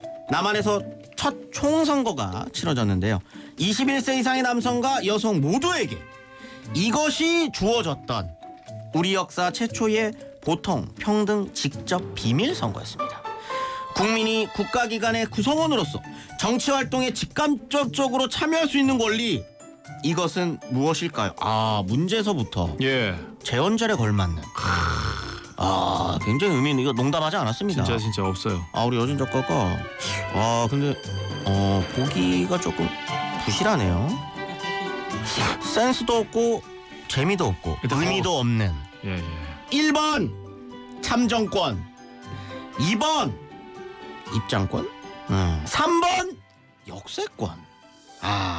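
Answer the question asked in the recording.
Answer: 1: 참정권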